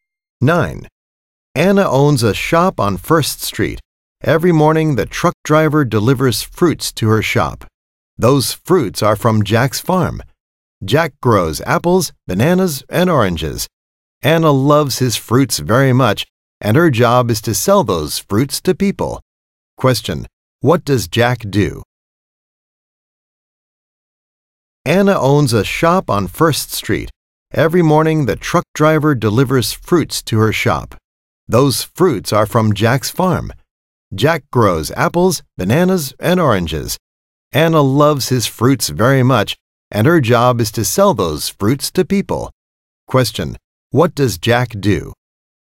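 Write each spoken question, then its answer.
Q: what does Jack do?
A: He is a farmer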